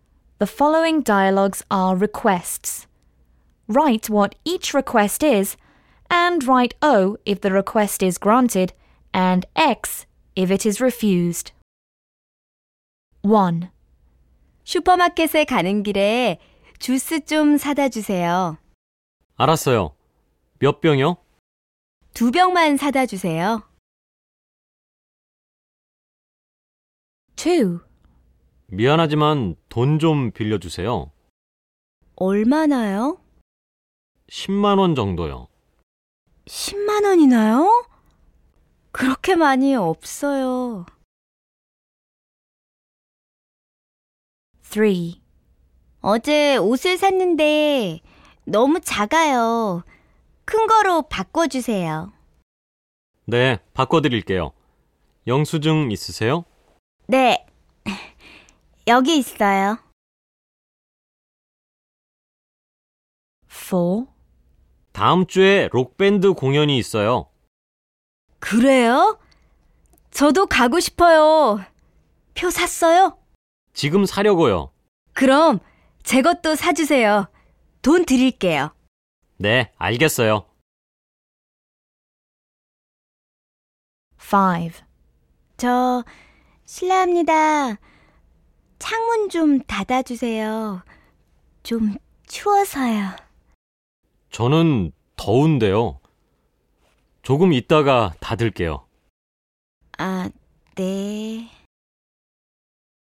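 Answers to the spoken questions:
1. Buy juice on the way to the supermarket: O
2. Lend money (100,000 won): X
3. Exchange clothes for a bigger size: O
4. Buy a rock band concert ticket for me too: O
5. Close the window: X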